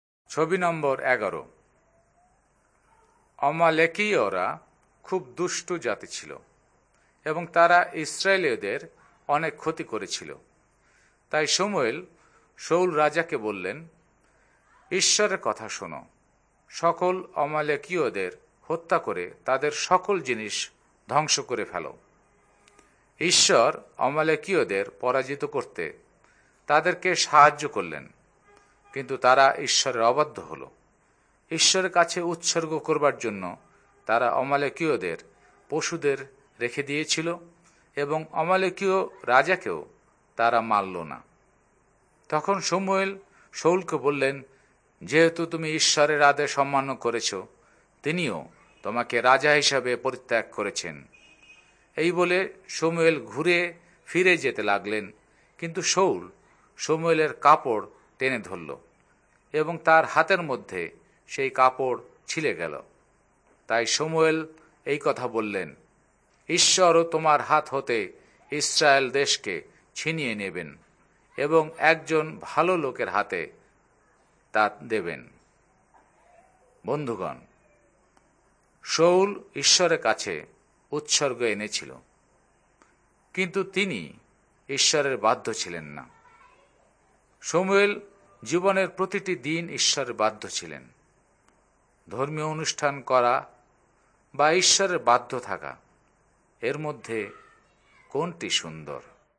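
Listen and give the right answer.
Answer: ঈশ্বরের বাধ্য থাকা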